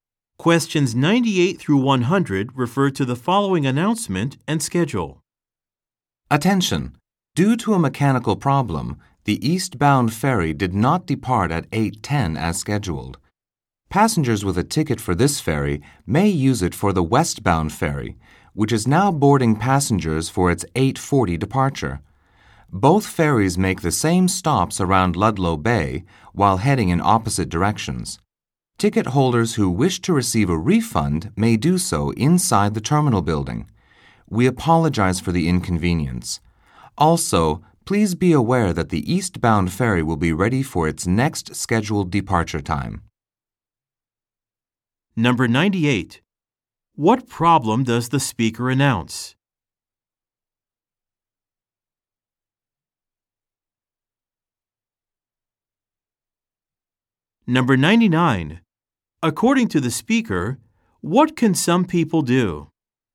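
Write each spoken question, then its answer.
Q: What problem does the speaker announce?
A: The eastbound ferry did not depart due to a mechanical problem

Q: According to the speaker, what can some people do?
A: Use their ticket on the westbound ferry or get a refund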